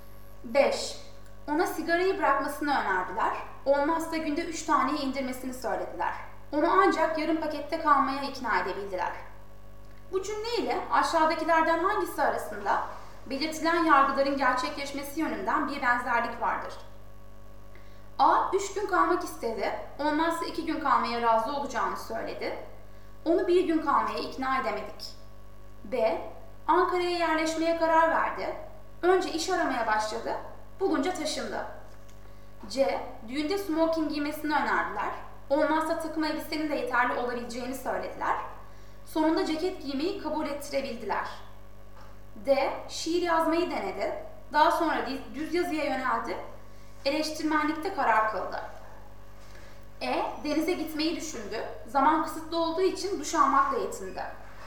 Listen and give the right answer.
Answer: Doğru yanıt C.